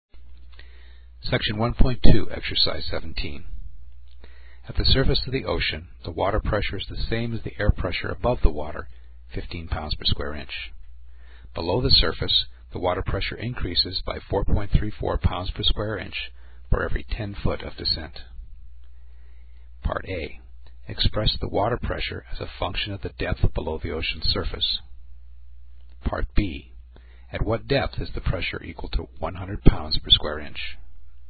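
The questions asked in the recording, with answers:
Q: Express the water pressure as a function of the depth below the ocean's surface.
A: P = 0.434d + 15 (pounds per square inch, d in feet)

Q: At what depth is the pressure equal to 100 pounds per square inch?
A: About 195.9 feet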